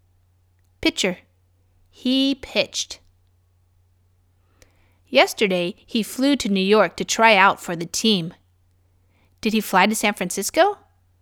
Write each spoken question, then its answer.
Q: Did he fly to San Francisco?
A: No, he didn't fly to San Francisco.